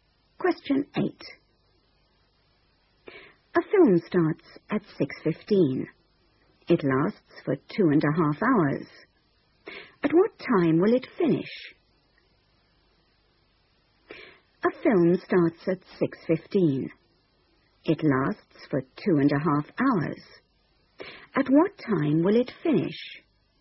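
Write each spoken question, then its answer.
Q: At what time will it finish?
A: 8:45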